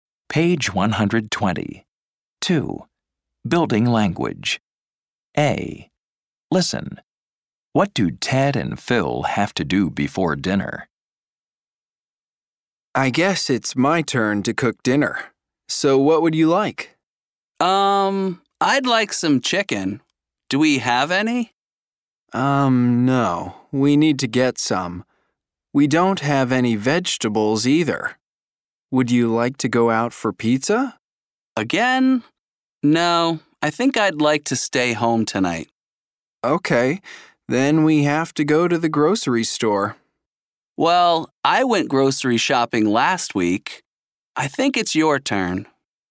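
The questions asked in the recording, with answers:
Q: What do Ted and Phil have to do before dinner?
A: Go to the grocery store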